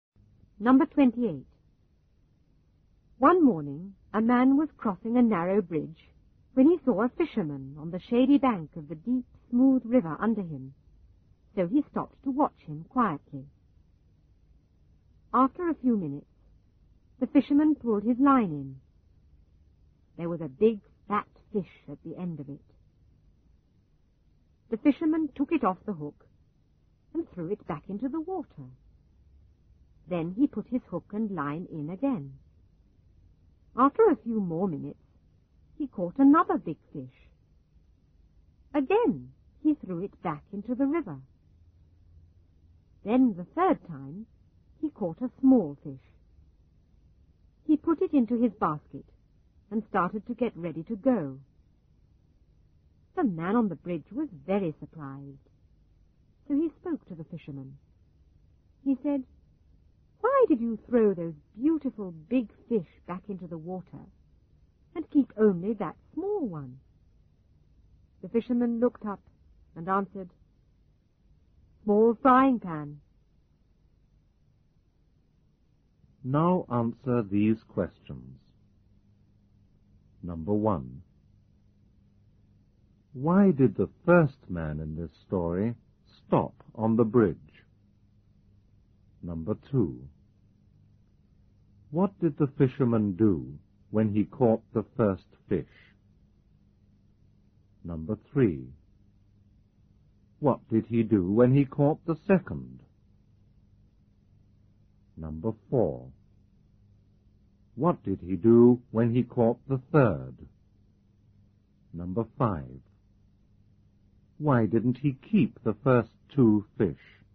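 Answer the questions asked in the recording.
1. To watch the fisherman
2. He threw it back into the water
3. He threw it back into the river
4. He put it into his basket and got ready to go
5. Because his frying pan was small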